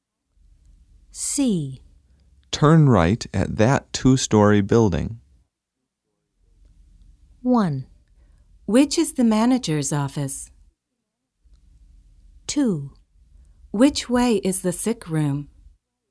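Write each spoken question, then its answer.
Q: Turn right at that two-story building.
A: 2: Which way is the sick room?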